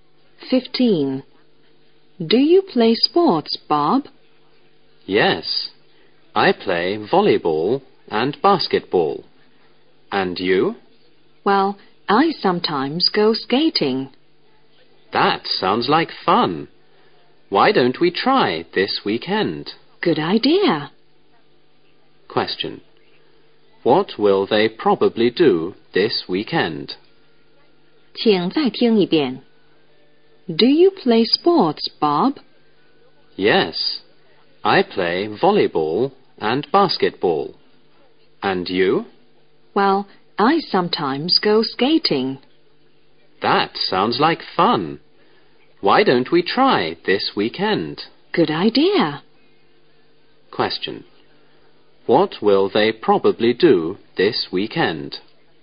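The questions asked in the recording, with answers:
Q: What will they probably do this weekend?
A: Go skating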